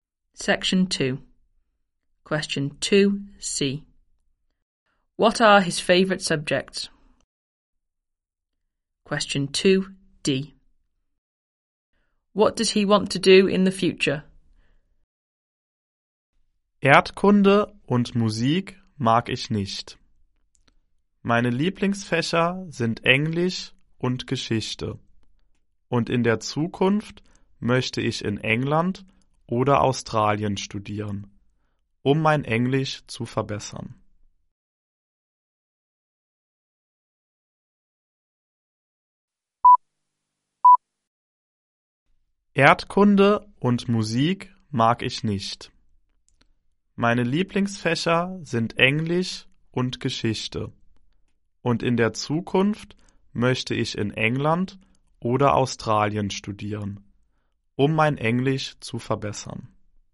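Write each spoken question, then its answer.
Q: What are his favorite subjects?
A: English and history

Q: What does he want to do in the future?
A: Study in England or Australia to improve his English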